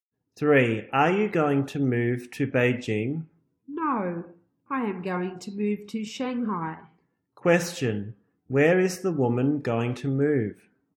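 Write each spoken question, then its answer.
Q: where is the woman going to move?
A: Shanghai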